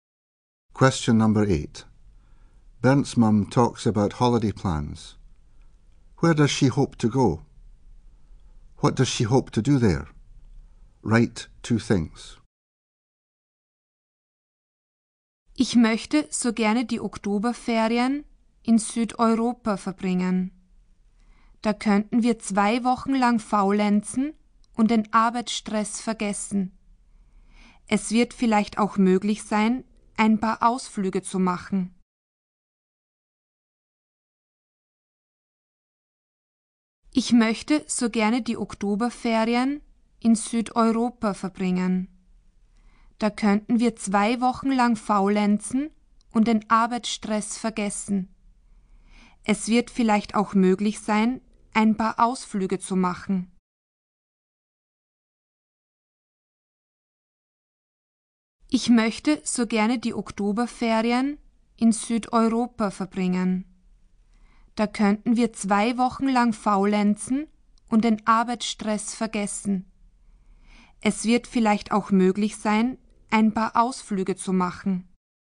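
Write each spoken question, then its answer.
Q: Where does she hope to go?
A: Southern Europe

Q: What does she hope to do there?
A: Laze around for two weeks and forget work stress; go on some trips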